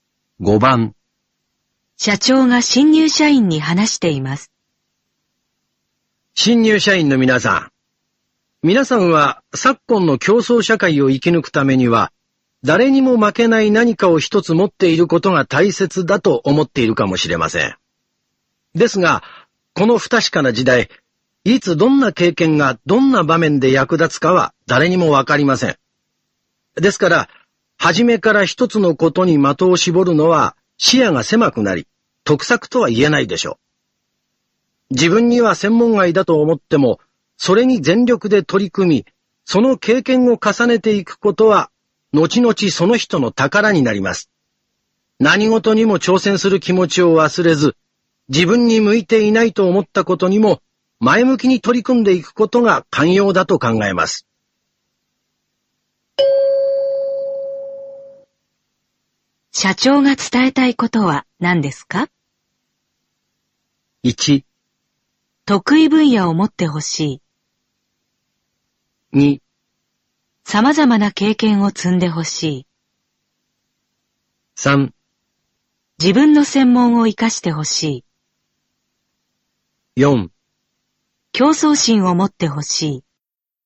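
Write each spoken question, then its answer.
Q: 社長が伝えたいことは何ですか?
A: 2: 様々な経験を積んでほしい。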